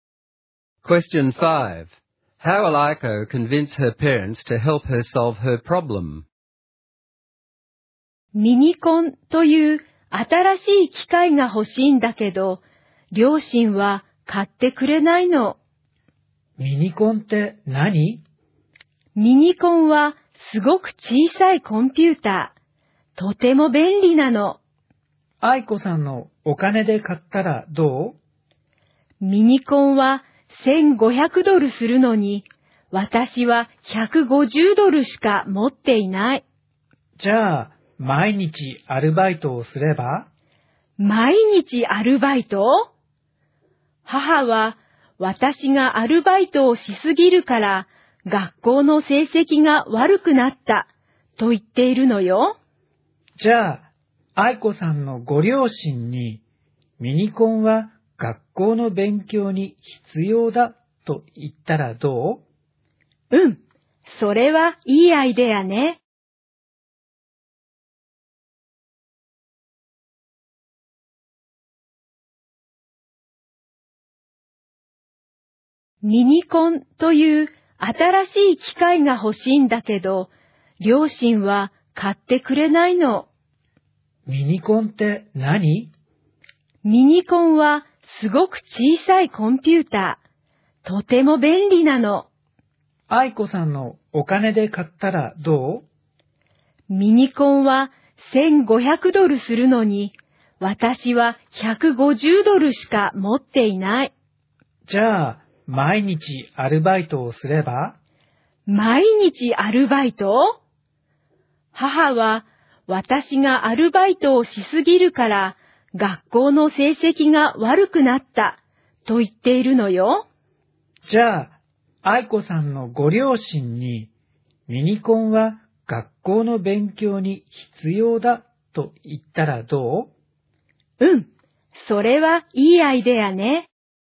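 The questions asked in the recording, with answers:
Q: How will Aiko convince her parents to help her solve her problem?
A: She will tell them the Minicon is necessary for her schoolwork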